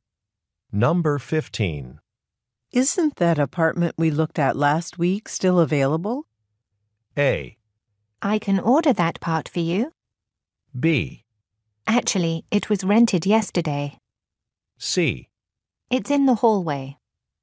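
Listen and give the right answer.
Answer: B: Actually, it was rented yesterday.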